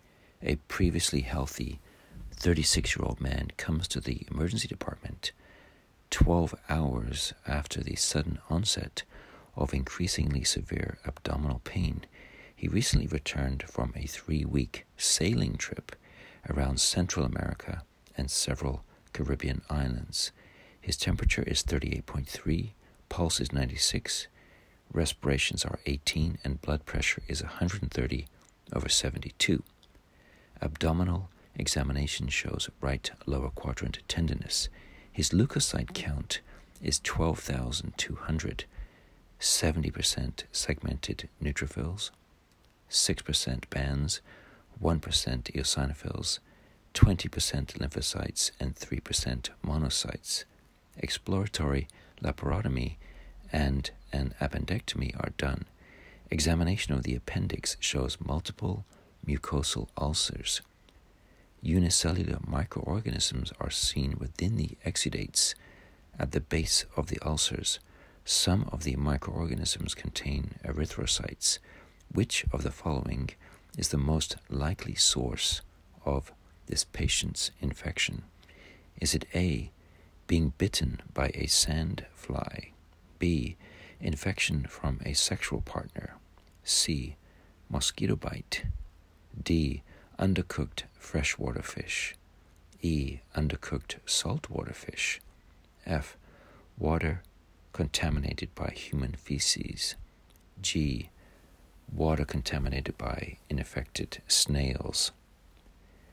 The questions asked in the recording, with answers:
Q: Which of the following is the most likely source of this patient's infection?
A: The answer is F. Water contaminated by human feces.